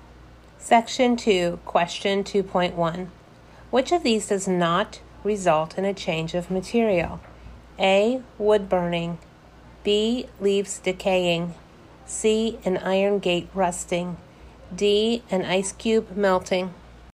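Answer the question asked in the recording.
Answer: D: an ice cube melting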